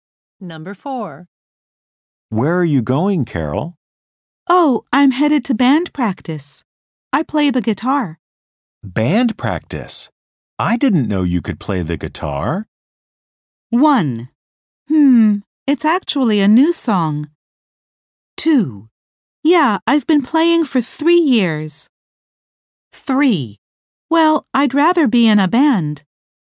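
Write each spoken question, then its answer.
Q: Band practice?I didn't know you could play the guitar.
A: 2: Yeah, I've been playing for 3 years.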